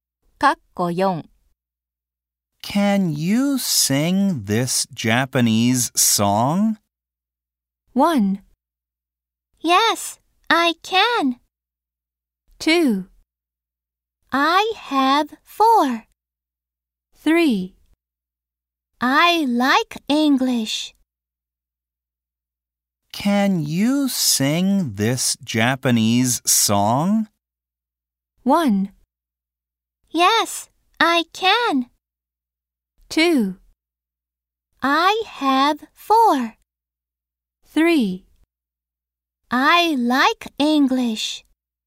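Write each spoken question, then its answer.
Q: Can you sing this Japanese song?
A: 1: Yes, I can.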